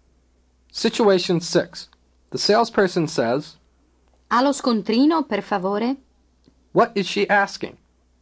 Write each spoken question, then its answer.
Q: What is she asking?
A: Do you have the receipt, please?